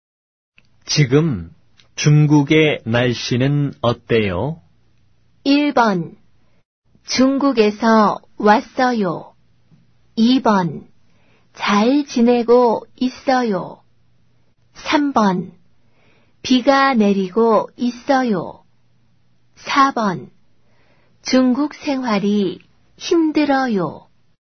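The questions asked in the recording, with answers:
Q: 지금 중국의 날씨는 어때요?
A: 3: 비가 내리고 있어요.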